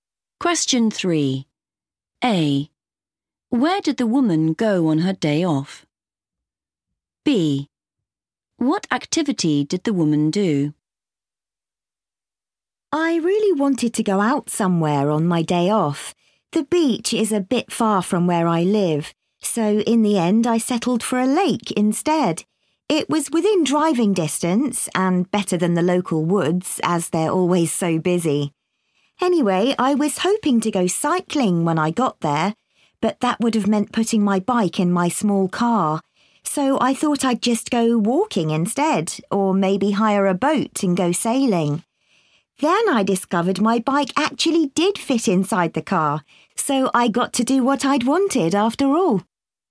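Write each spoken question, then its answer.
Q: Where did the woman go on her day off?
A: a lake

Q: What activity did the woman do?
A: cycling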